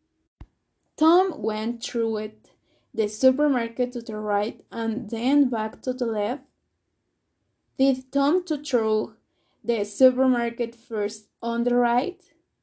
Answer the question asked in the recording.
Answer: Yes, Tom went through the supermarket first on the right.